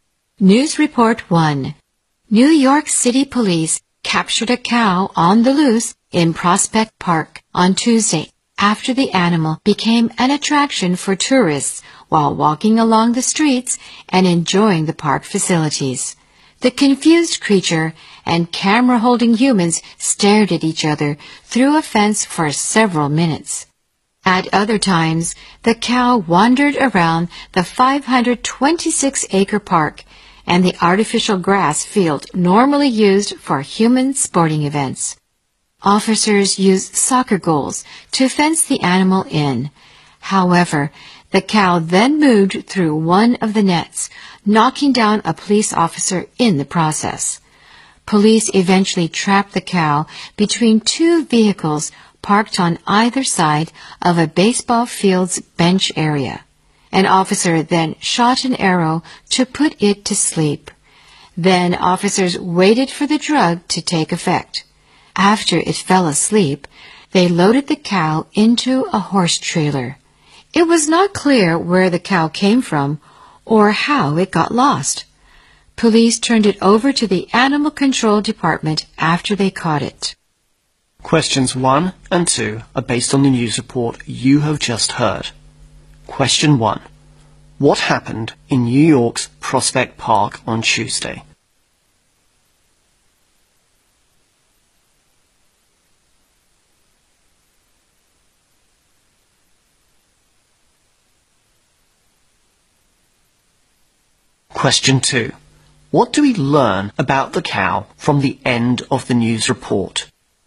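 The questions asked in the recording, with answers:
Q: What happened in New York's Prospect Park on Tuesday?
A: Police captured a cow on the loose that had become a tourist attraction

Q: What do we learn about the cow from the end of the news report?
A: It was unclear where it came from; it was handed to Animal Control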